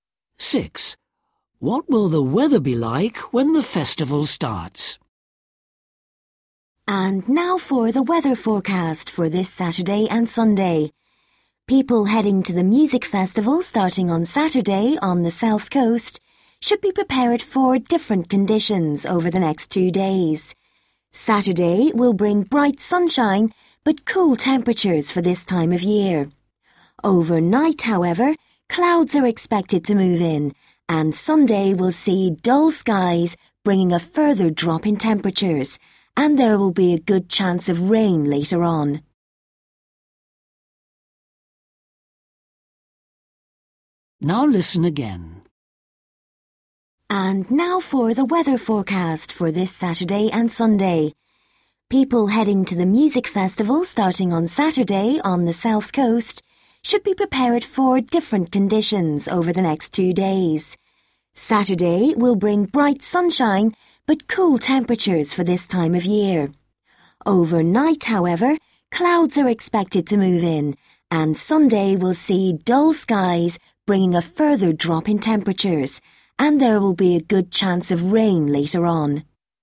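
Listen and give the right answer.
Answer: sunny but cool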